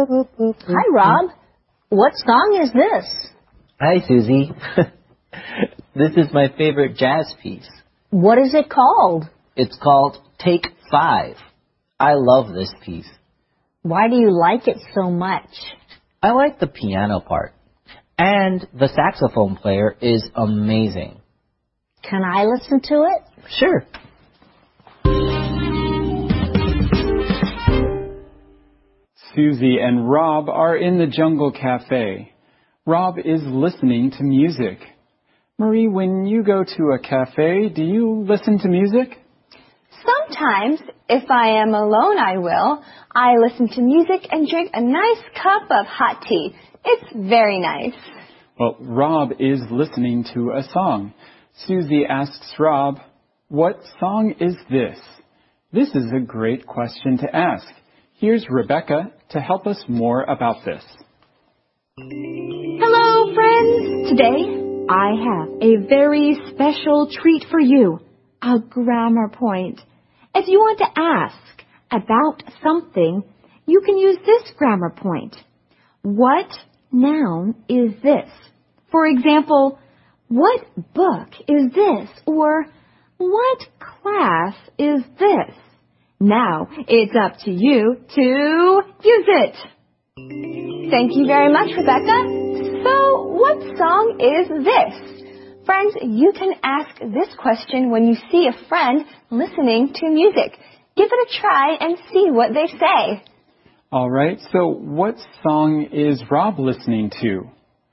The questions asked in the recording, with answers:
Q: All right, so what song is Rob listening to?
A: That's right, he's listening to his favorite jazz piece.